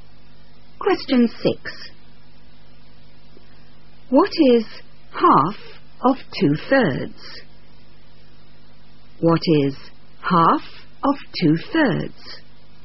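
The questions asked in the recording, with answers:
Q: What is half of 2/3?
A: 1/3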